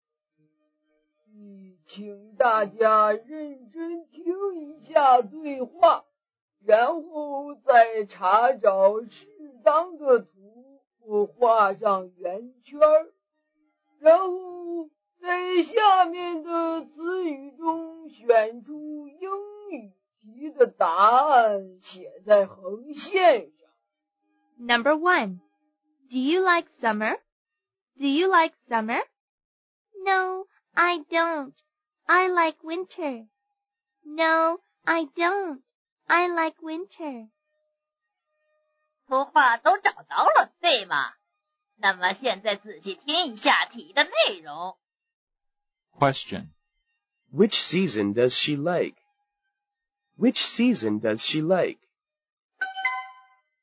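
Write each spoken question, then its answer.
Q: Which season does she like?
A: Winter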